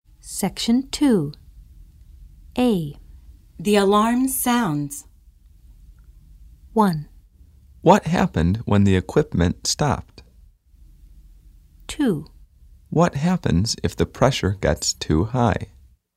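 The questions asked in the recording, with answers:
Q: The alarm sounds.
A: 2: What happens if the pressure gets too high?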